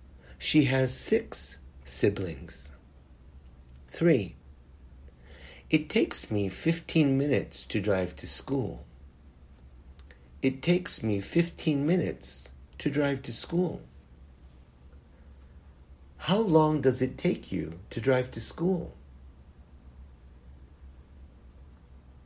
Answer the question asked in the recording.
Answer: It takes me 15 minutes to drive to school.